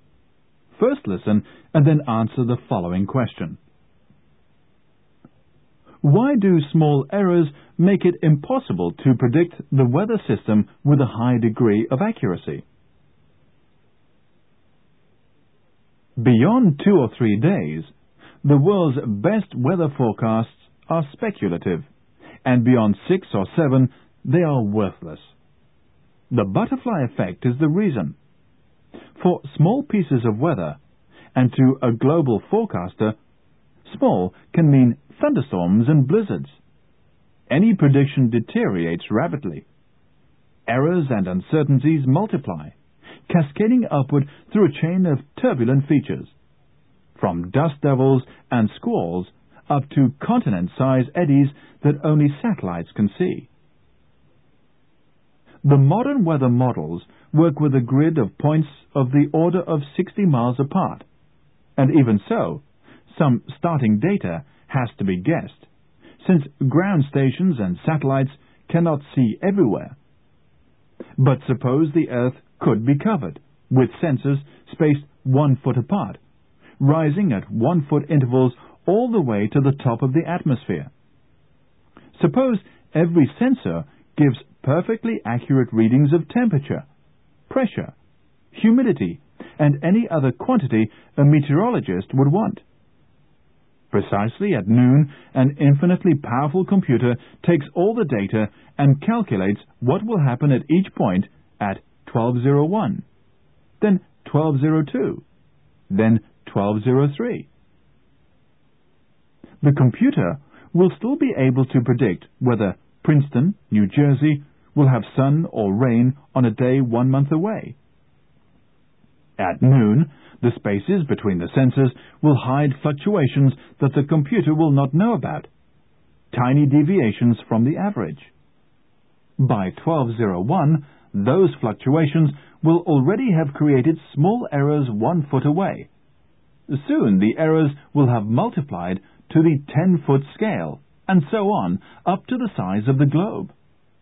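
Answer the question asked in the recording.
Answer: Because small errors and uncertainties multiply rapidly, cascading upward through a chain of turbulent features until they reach the size of the globe (the butterfly effect).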